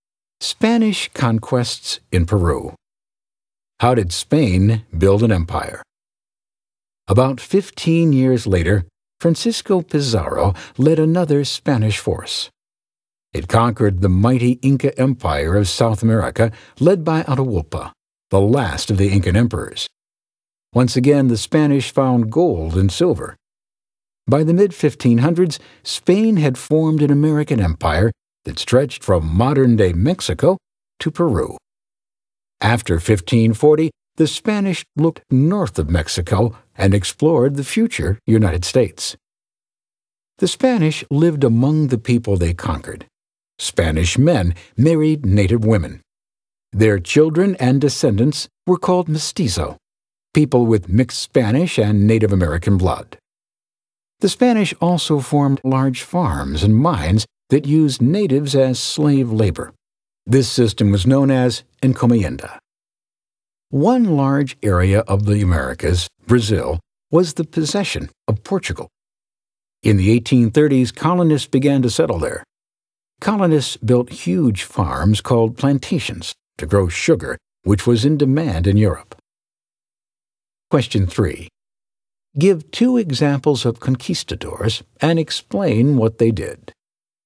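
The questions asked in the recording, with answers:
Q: Give two examples of conquistadors and explain what they did.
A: Cortés conquered the Aztec Empire in Mexico; Pizarro conquered the Inca Empire in Peru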